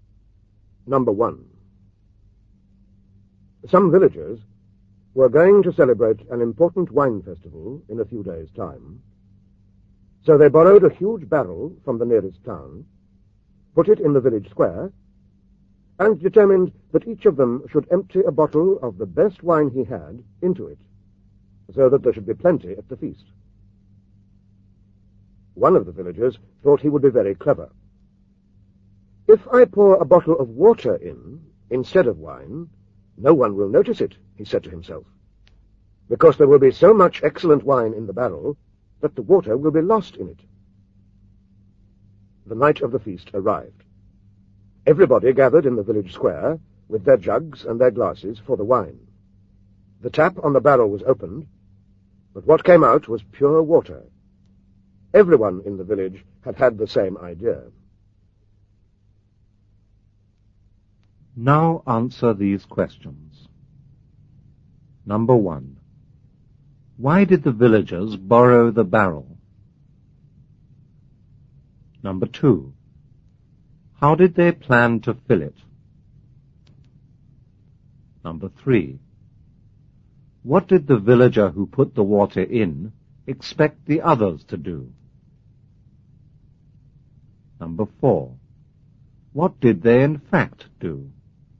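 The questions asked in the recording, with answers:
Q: Why did the villagers borrow the barrel?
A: To hold wine for an important wine festival

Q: How did they plan to fill it?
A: Each villager would pour a bottle of his best wine into it

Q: What did the villager who put the water in expect the others to do?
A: To pour in wine, so his water would not be noticed

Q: What did they in fact do?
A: They all poured in water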